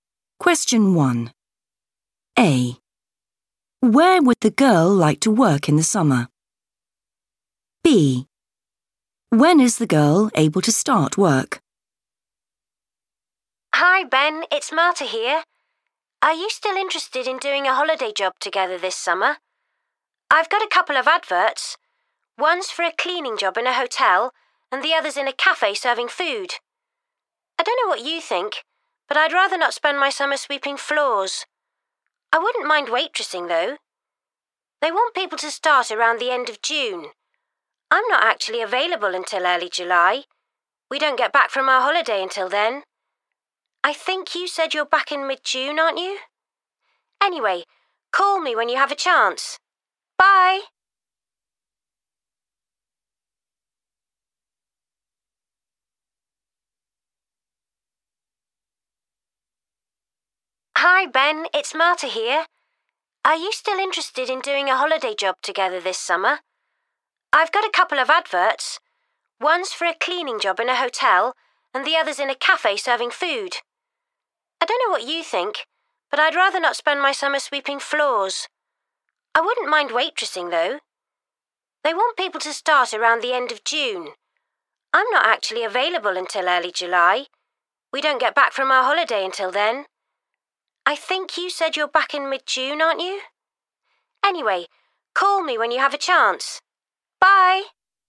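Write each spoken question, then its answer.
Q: Where would the girl like to work in the summer?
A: in a cafe

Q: When is the girl able to start work?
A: early July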